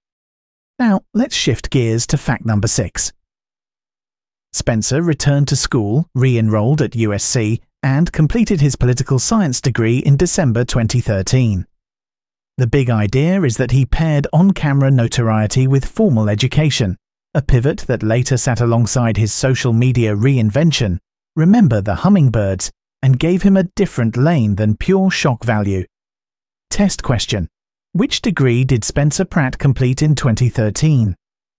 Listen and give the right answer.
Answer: Correct answer, political science.